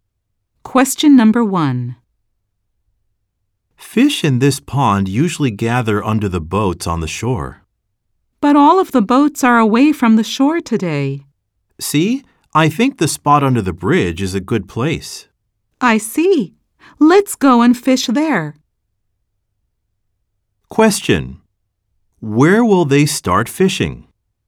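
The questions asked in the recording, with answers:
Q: Where will they start fishing?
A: Under the bridge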